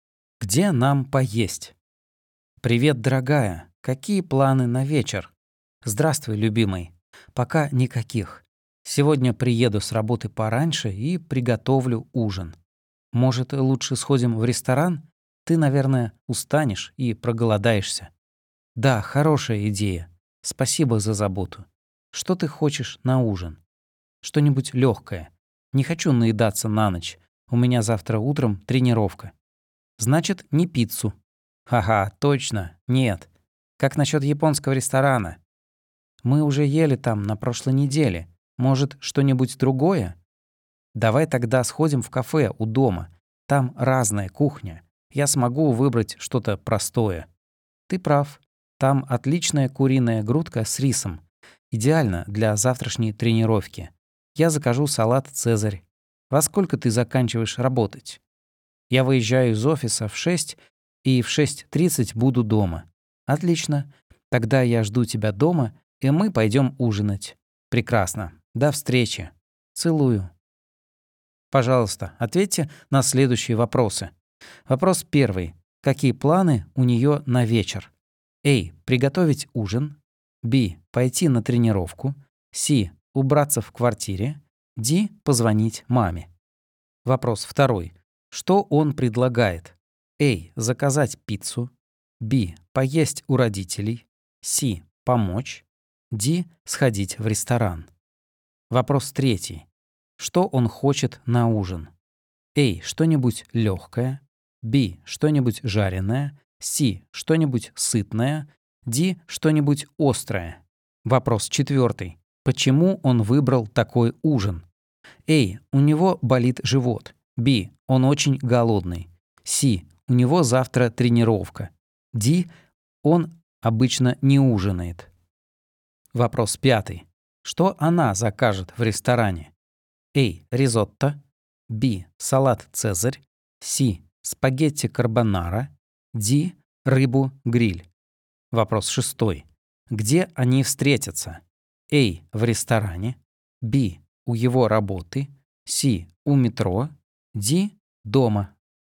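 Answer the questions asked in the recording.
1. A: Приготовить ужин.
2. D: Сходить в ресторан.
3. A: Что-нибудь легкое.
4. C: У него завтра тренировка.
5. B: Салат «Цезарь».
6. D: Дома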